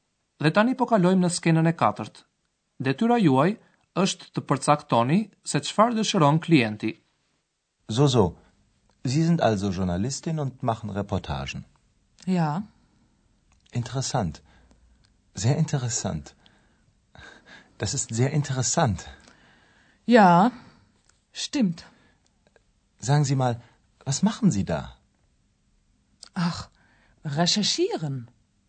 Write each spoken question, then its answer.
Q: Detyra juaj është të përcaktoni se çfarë dëshiron klienti.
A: djaloshi përpiqet të hapë një bisedë, por gruaja e re nuk ka shumë dëshirë.